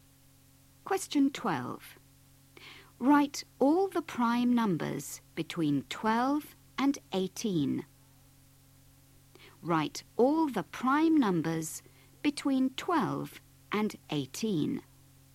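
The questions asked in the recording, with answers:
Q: Write all the prime numbers between 12 and 18.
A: 13, 17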